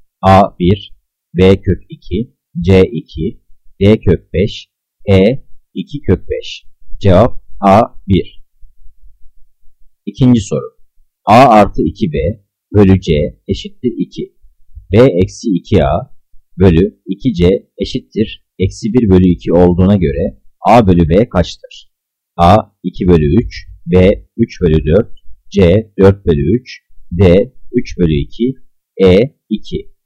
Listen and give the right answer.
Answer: Cevap C 4 bölü 3.